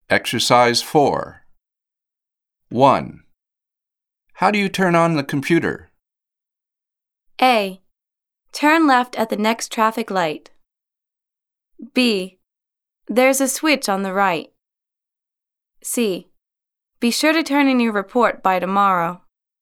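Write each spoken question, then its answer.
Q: How do you turn on the computer?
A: B: There's a switch on the right.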